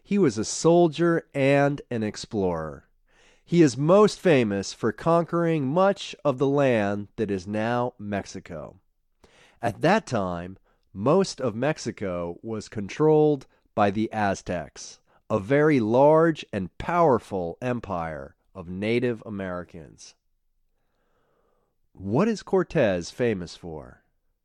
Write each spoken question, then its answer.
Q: What is Cortez famous for?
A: Cortez is famous for conquering much of the land that is now Mexico.